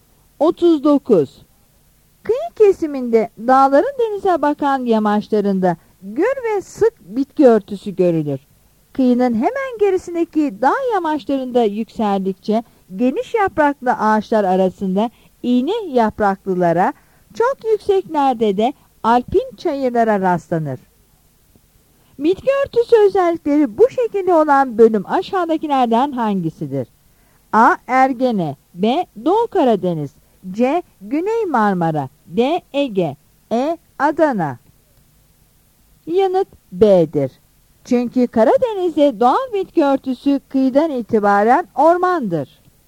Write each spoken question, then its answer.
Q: Bitki örtüsü özellikleri bu şekilde olan bölüm aşağıdakilerden hangisidir?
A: Yanıt B'dir.